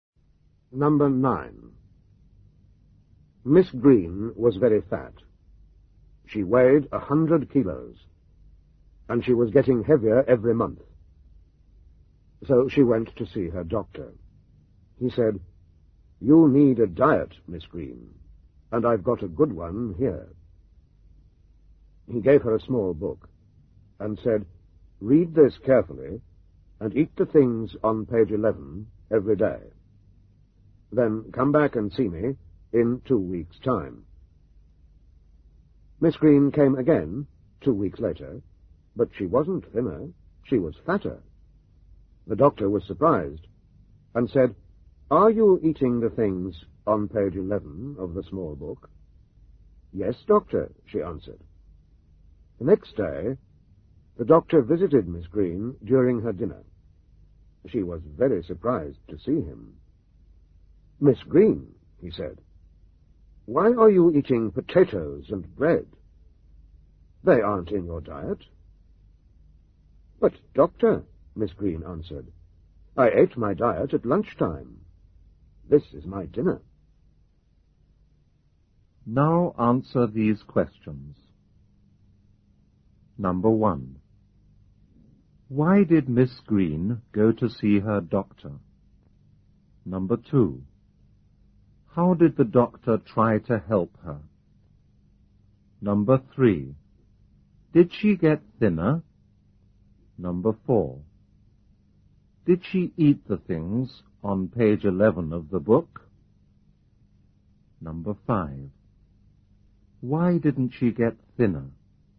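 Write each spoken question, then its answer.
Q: Why did Miss Green go to see her doctor?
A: Because she was very fat and getting heavier

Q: How did the doctor try to help her?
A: He gave her a diet in a small book

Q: Did she get thinner?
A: No, she got fatter

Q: Did she eat the things on page 11 of the book?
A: Yes, at lunchtime

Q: Why didn't she get thinner?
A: She ate her diet at lunch and then ate a normal dinner too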